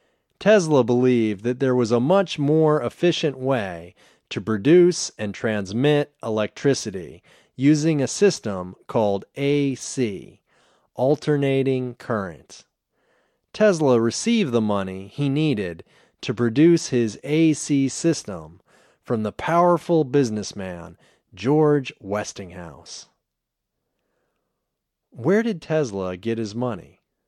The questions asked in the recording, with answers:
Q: Where did Tesla get his money?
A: Tesla got his money from George Westinghouse.